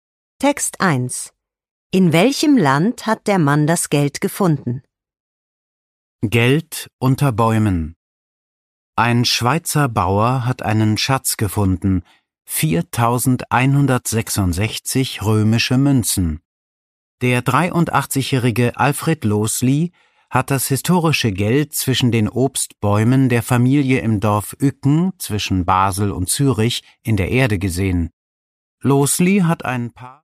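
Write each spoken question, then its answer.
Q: In welchem Land hat der Mann das Geld gefunden?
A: In der Schweiz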